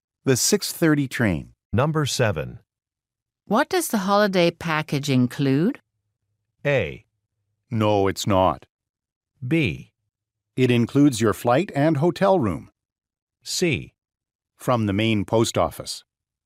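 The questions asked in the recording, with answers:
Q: What does the holiday package include?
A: B: It includes your flight and hotel room.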